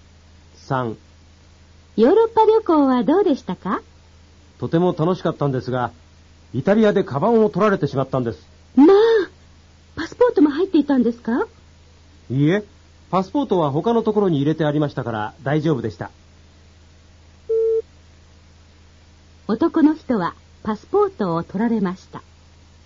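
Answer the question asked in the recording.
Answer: 正しくない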